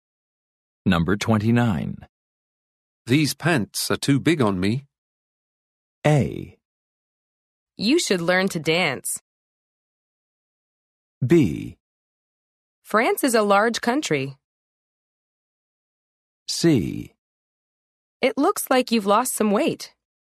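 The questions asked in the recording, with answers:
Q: These pants are too big on me.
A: C: It looks like you've lost some weight.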